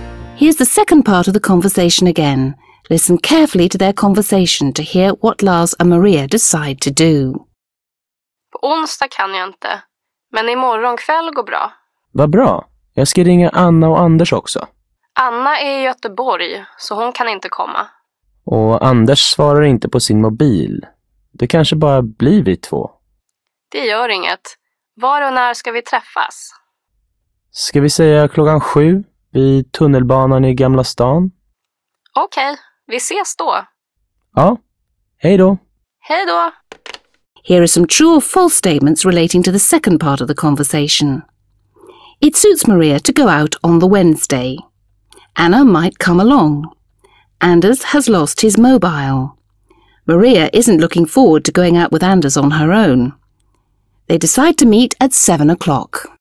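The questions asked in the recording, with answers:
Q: Anna might come along.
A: False

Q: Anders has lost his mobile.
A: False

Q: Maria isn't looking forward to going out with Anders on her own.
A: False

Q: They decide to meet at 7 o'clock.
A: True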